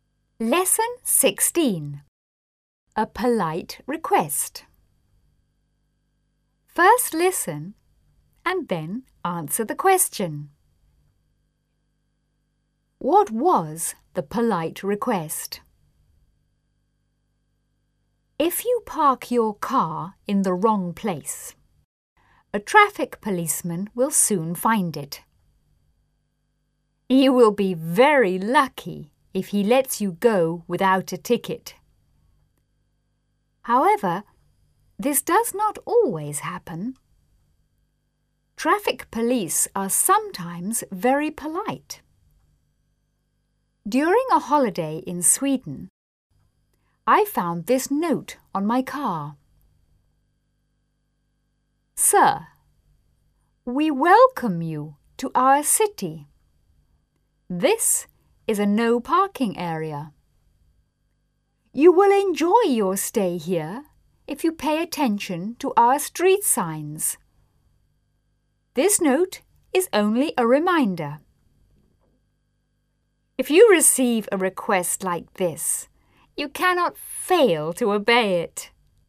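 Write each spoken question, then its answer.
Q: What was the polite request?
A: To pay attention to the street signs and not park in a no parking area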